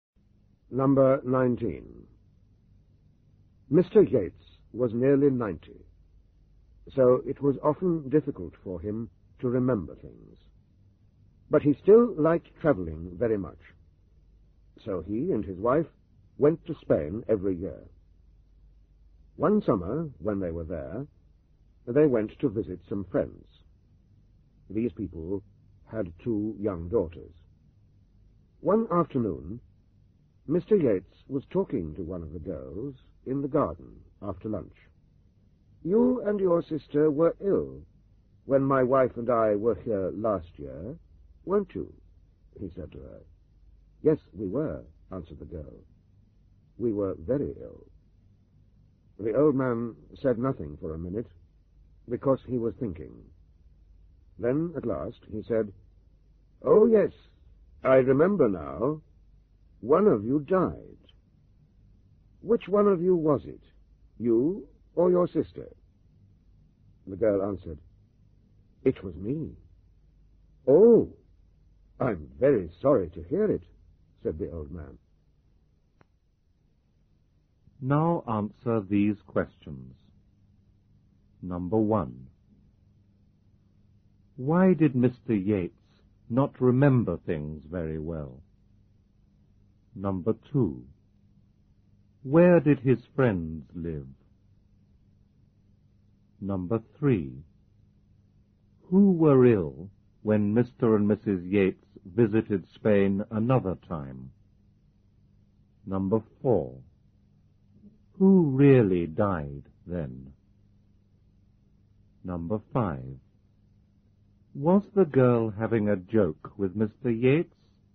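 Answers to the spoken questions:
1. Because he was nearly 90 (very old).
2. In Spain.
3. The two young daughters of their friends.
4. Nobody.
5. Yes, she was.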